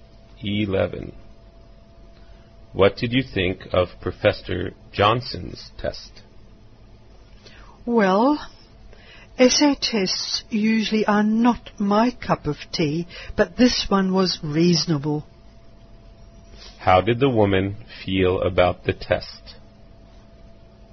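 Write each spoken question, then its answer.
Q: How did the woman feel about the test?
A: It was reasonable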